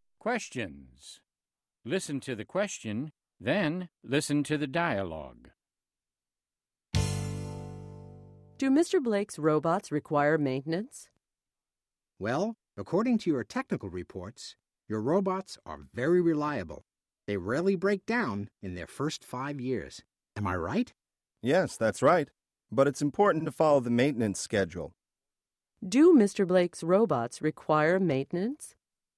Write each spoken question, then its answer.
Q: Do Mr. Blake's robots require maintenance?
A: Yes, they do. It's important to follow the maintenance schedule.